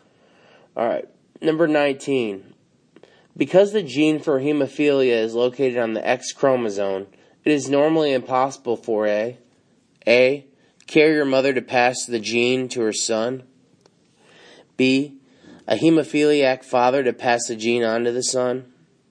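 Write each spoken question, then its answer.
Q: Because the gene for hemophilia is located on the X chromosome, it is normally impossible for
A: B: a hemophiliac father to pass the gene on to the son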